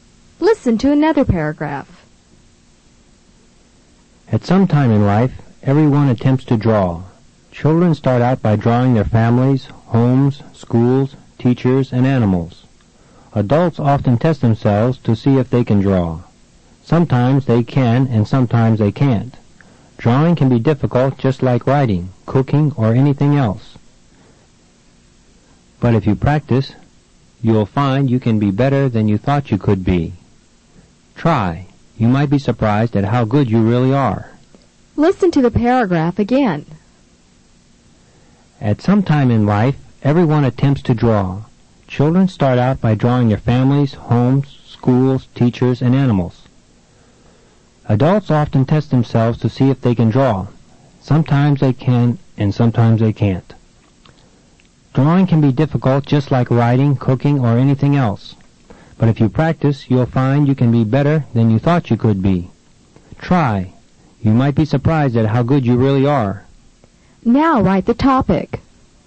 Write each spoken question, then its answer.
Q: Now write the topic.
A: Let's check your answer. The topic is drawing.